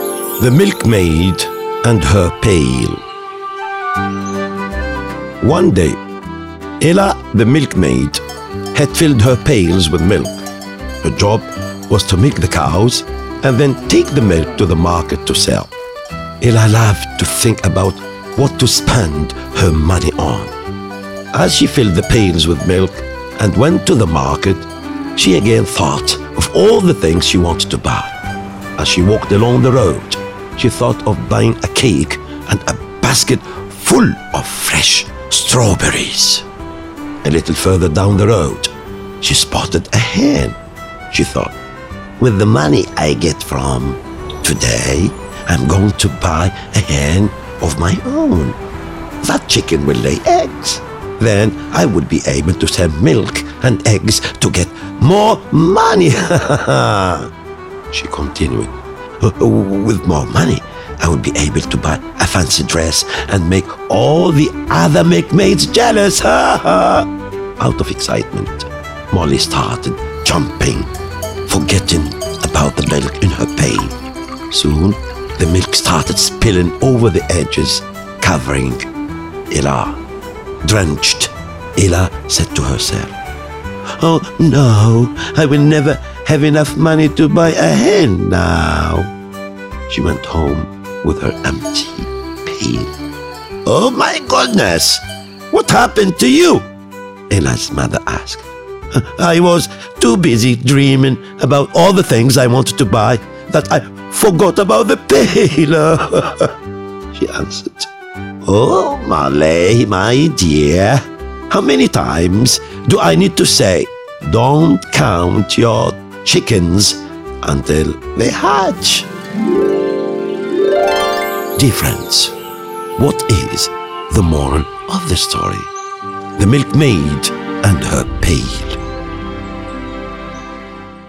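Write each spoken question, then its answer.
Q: Dear friends, what is the moral of the story?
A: Don't count your chickens until they hatch.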